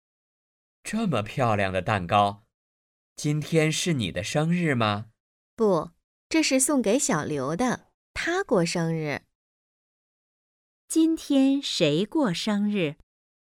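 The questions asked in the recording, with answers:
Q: 今天谁过生日?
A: 小刘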